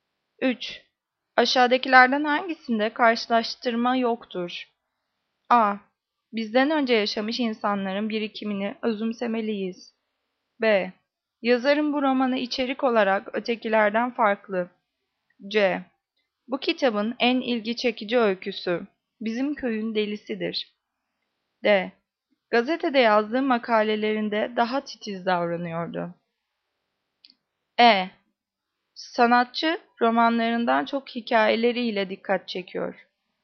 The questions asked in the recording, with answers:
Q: Aşağıdakilerden hangisinde karşılaştırma yoktur?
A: Cevap A. Bizden önce yaşamış insanların birikimini özümsemeliyiz.